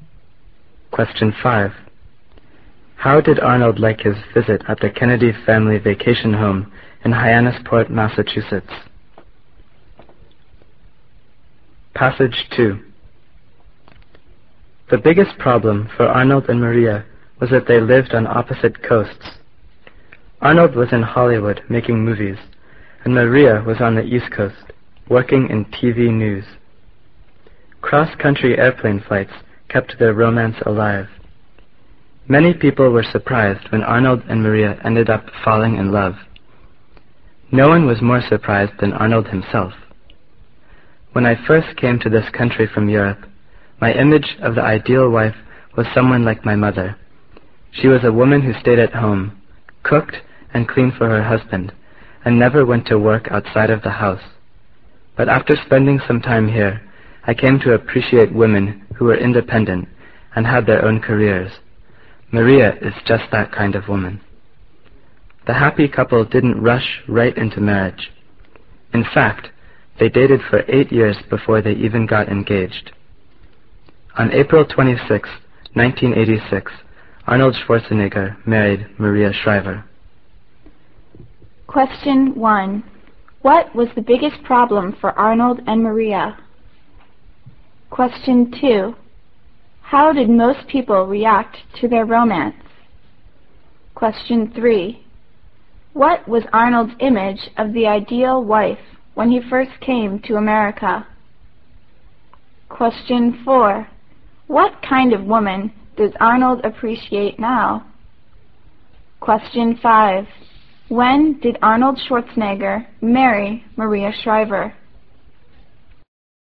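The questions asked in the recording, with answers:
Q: What was the biggest problem for Arnold and Maria?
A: They lived on opposite coasts

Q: How did most people react to their romance?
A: They were surprised

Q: What was Arnold's image of the ideal wife when he first came to America?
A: Someone like his mother, who stayed at home and did housework

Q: What kind of woman does Arnold appreciate now?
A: Independent women with their own careers

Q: When did Arnold Schwarzenegger marry Maria Shriver?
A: April 26, 1986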